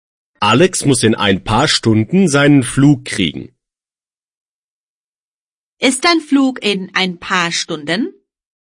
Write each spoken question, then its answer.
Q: Ist dein Flug in ein paar Stunden?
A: Ja, mein Flug ist in ein paar Stunden.